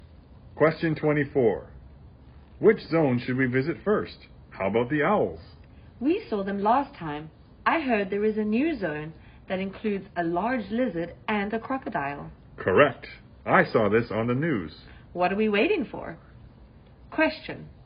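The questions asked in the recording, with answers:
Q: Which zone should we visit first?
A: The new zone with the large lizard and crocodile (reptiles)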